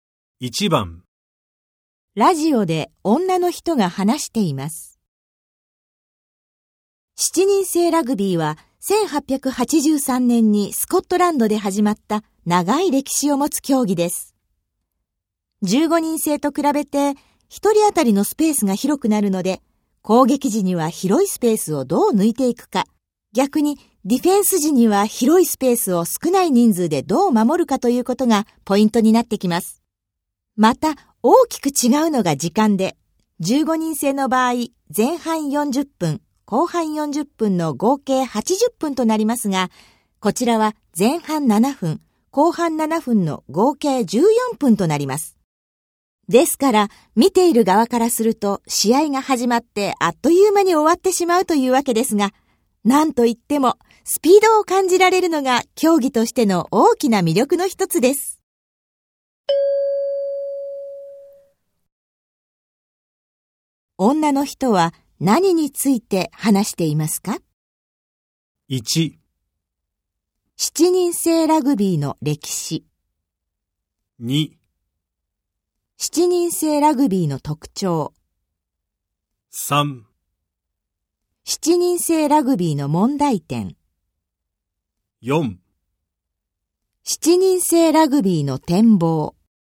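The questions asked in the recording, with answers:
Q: 女の人は何について話していますか?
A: 2: 7人制ラグビーの特徴。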